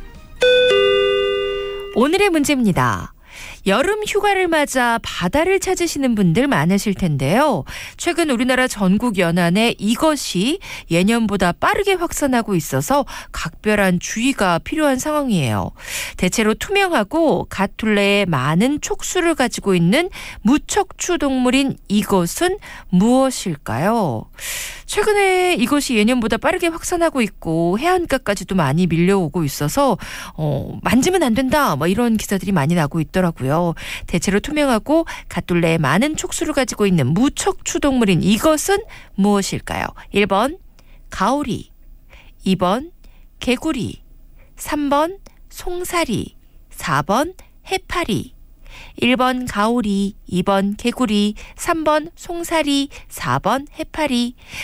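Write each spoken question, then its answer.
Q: 대체로 투명하고 갓둘레에 많은 촉수를 가지고 있는 무척추 동물인 이것은 무엇일까요?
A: 4: 해파리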